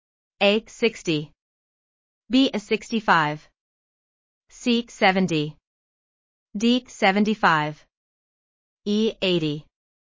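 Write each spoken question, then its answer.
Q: What is 50 plus 25? A. 60. B. 65. C. 70. D. 75. E. 80.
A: D: 75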